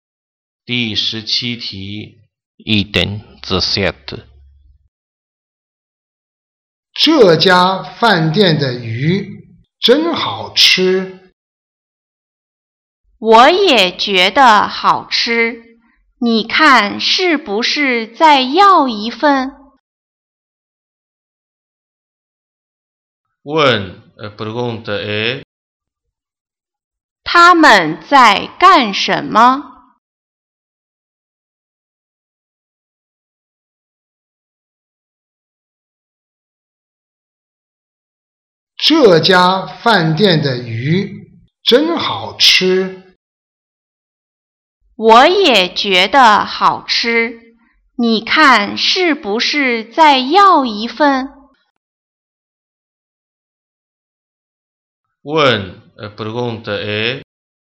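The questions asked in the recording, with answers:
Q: 他们在干什么?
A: 在饭店吃鱼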